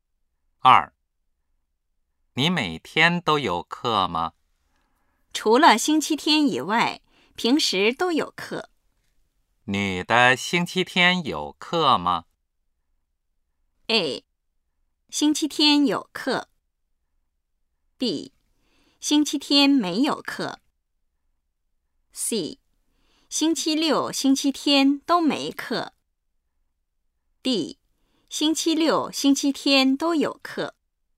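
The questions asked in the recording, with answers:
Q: 你的星期天有课吗?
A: B: 星期天没有课。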